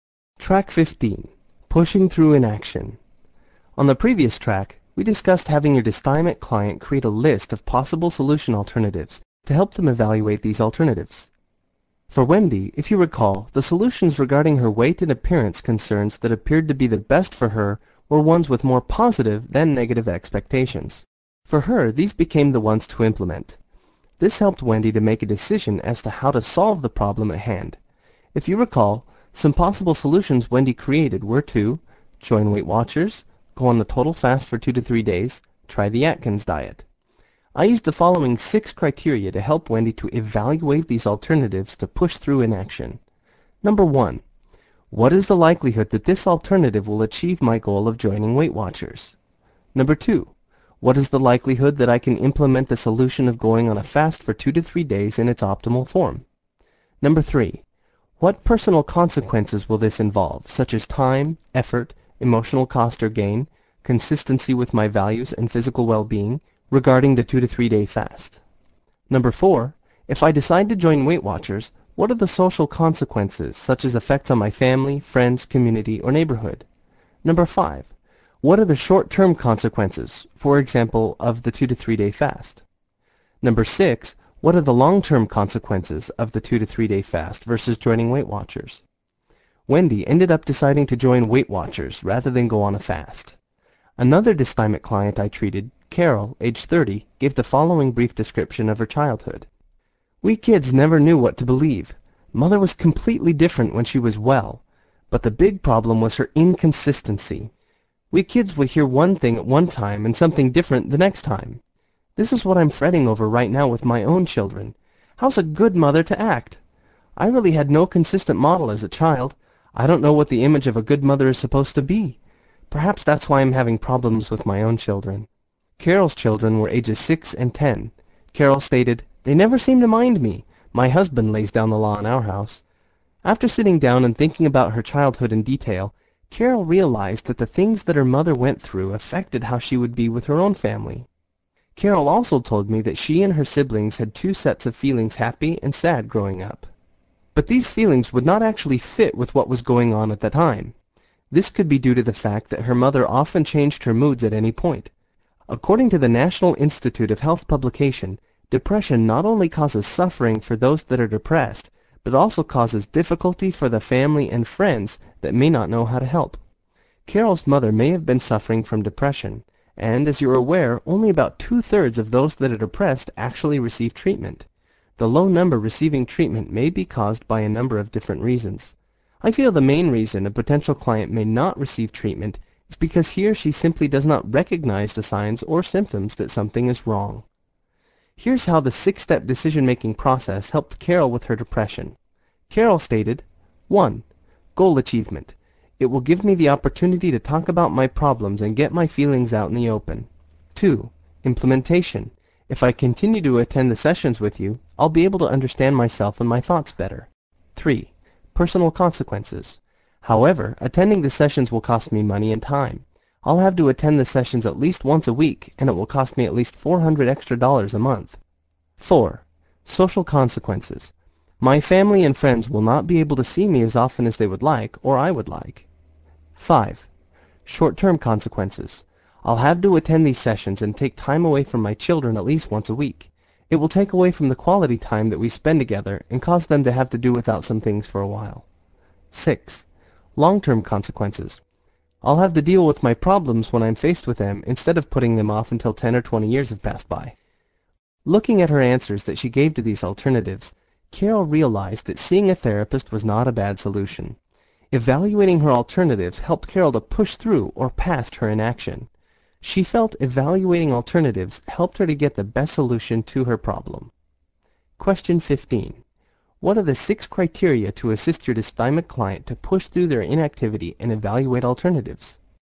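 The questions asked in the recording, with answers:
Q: What are the 6 criteria to assist your dysthymic client to push through their inactivity and evaluate alternatives?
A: Goal achievement, implementation, personal consequences, social consequences, short-term consequences, and long-term consequences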